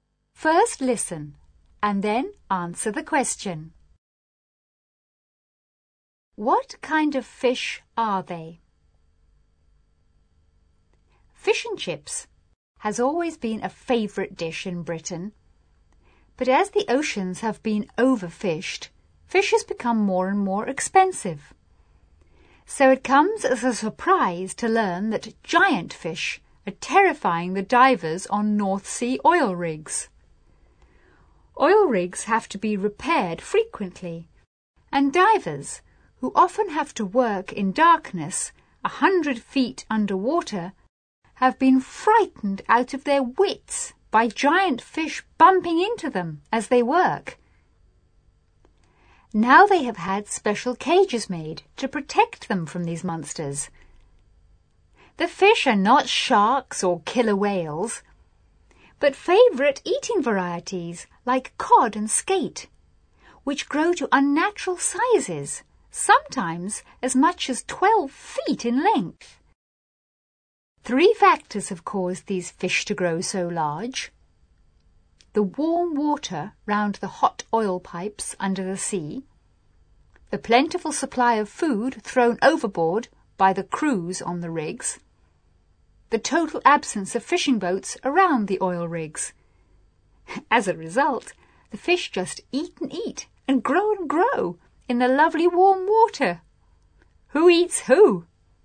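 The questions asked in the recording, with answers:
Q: What kind of fish are they?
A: Favourite eating varieties like cod and skate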